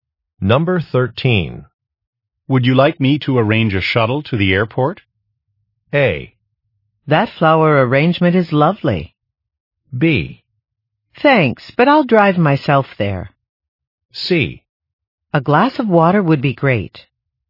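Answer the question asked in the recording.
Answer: B: Thanks, but I'll drive myself there.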